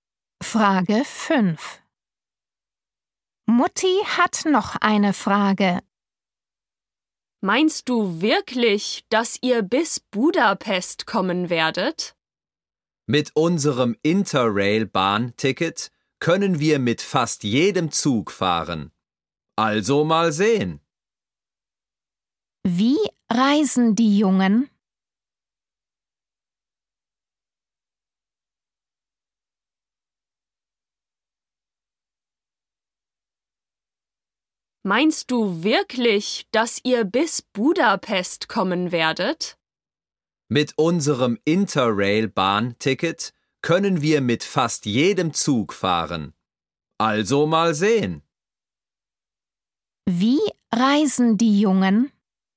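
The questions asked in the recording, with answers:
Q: Wie reisen die Jungen?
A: mit dem Zug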